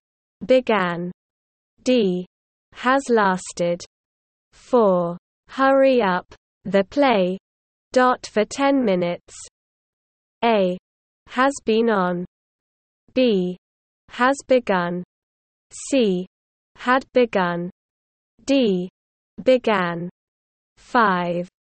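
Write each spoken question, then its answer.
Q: Hurry up. The play. Dot for 10 minutes.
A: A: Has been on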